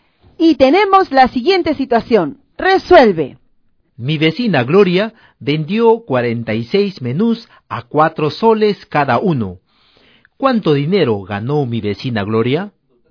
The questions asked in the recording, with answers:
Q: ¿Cuánto dinero ganó mi vecina Gloria?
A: 184 soles.